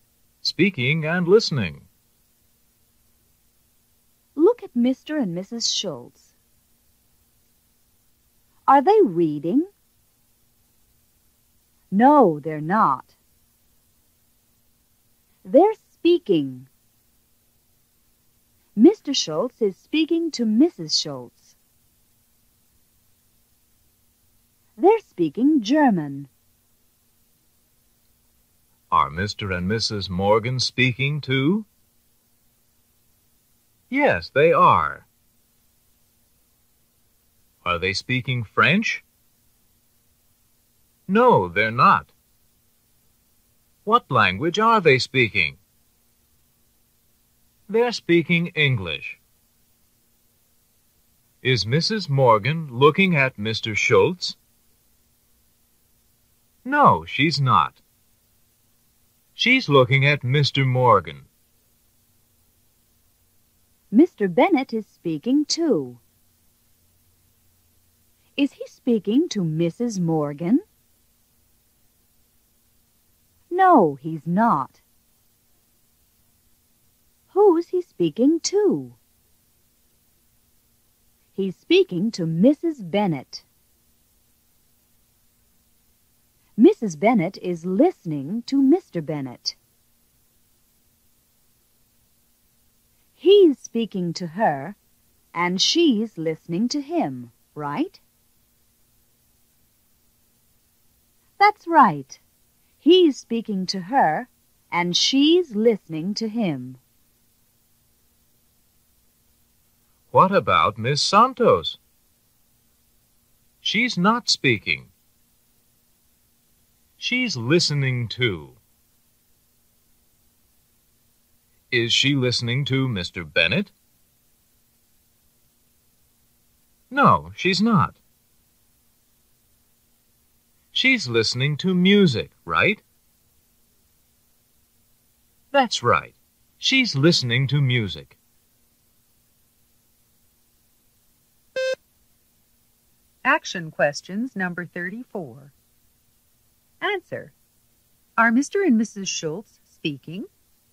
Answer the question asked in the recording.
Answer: Yes, they are.